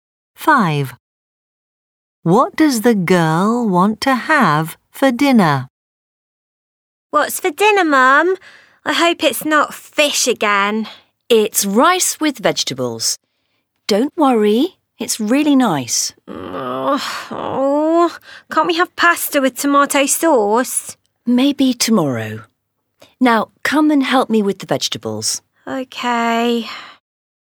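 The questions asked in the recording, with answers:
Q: What does the girl want to have for dinner?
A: pasta with tomato sauce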